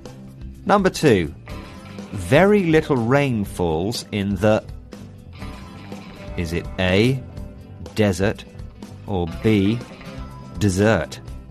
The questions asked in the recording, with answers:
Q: Number two. Very little rain falls in the... Is it A, desert, or B, dessert?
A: And the answer is A, desert.